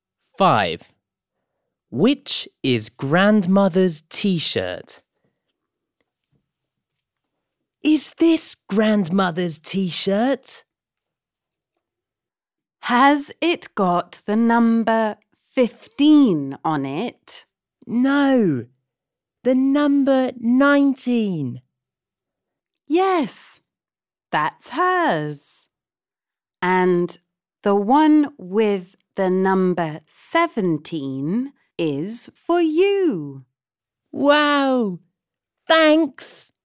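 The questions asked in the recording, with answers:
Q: Which is Grandmother's T-shirt?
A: The one with the number 19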